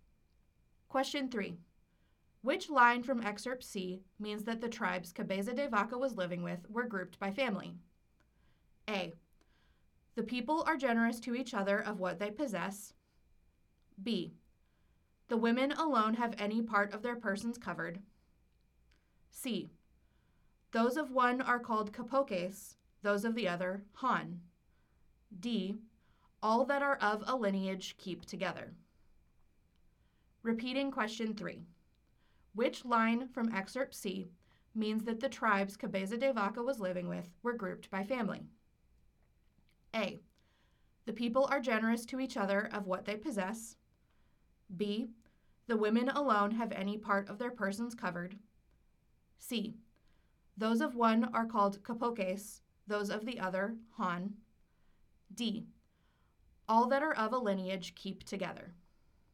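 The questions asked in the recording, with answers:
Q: Which line from excerpt C means that the tribes Cabeza de Vaca was living with were grouped by family?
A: D: All that are of a lineage keep together.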